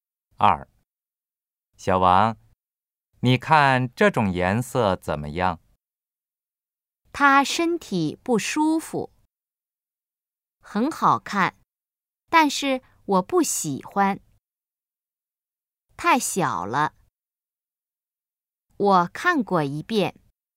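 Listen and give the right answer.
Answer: 很好看,但是我不喜欢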